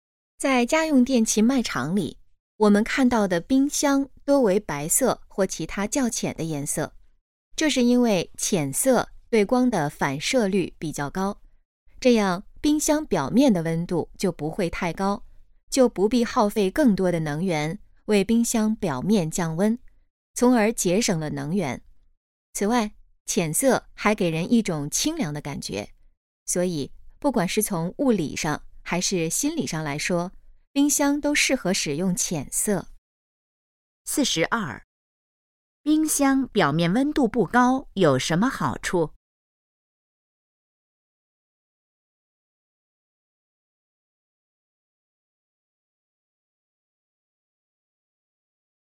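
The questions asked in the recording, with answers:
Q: 冰箱表面温度不高有什么好处?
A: 节省能源

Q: 这段话主要谈的是什么?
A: 冰箱为什么多用浅色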